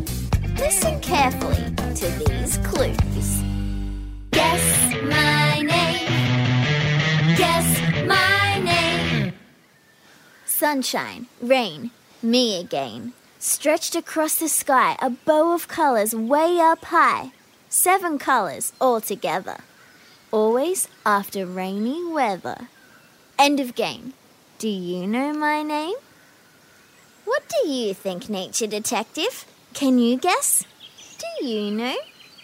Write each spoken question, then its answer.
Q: Do you know my name?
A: Yes! Today's special guest is a rainbow.